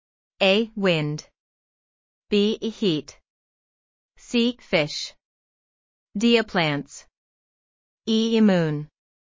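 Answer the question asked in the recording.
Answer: B: Heat.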